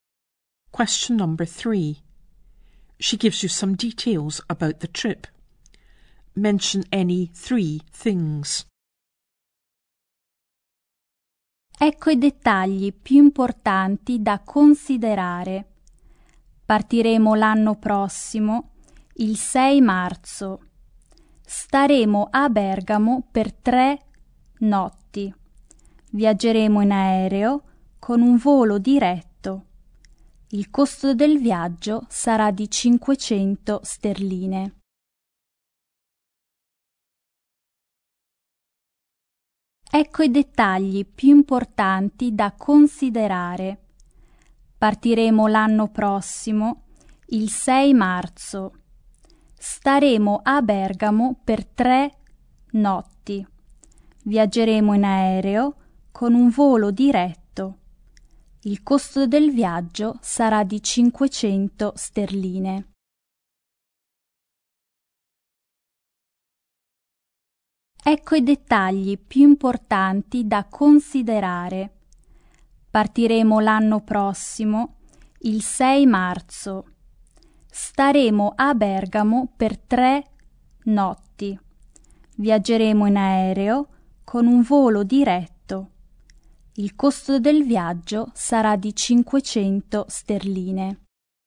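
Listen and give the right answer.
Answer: Leaving next year on 6 March; 3 nights in Bergamo; travelling by direct flight; costs £500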